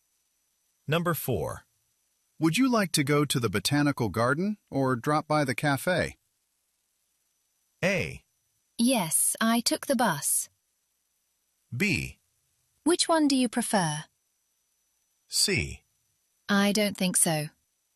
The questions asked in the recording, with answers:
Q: Would you like to go to the botanical garden or drop by the cafe?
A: 자, 그런 것들이 역시 정답이 될 수밖에 없겠죠.